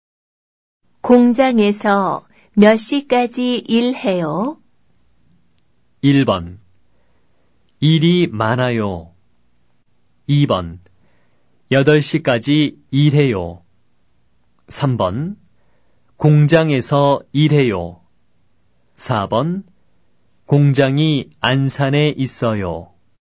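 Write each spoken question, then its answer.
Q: 공장에서 몇 시까지 일해요?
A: 2: 8시까지 일해요.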